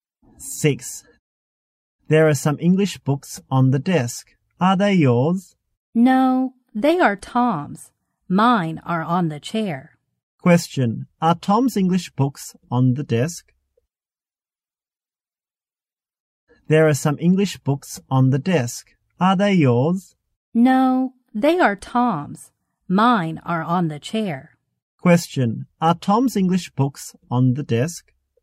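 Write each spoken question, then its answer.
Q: Are Tom's English books on the desk?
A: Yes, they are.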